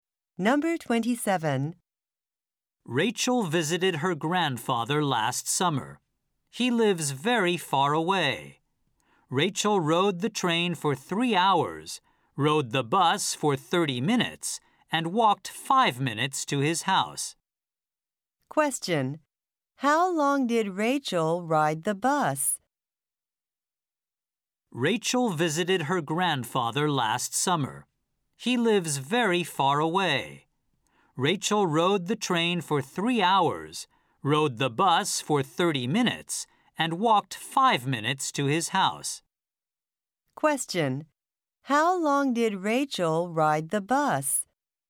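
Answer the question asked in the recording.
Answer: 30 minutes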